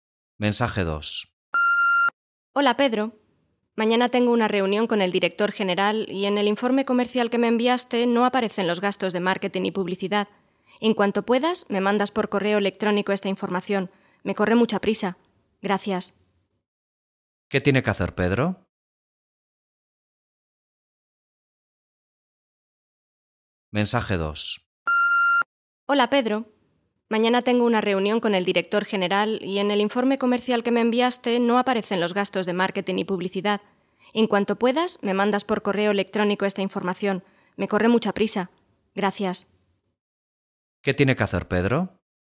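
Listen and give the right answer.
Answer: Enviar por correo electrónico los gastos de marketing y publicidad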